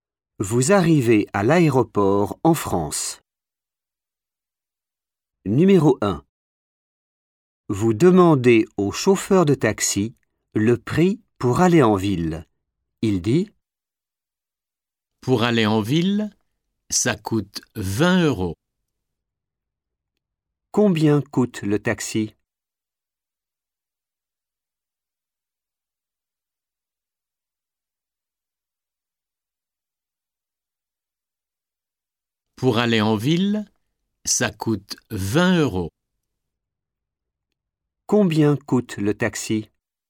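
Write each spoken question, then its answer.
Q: Combien coûte le taxi?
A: 20 euros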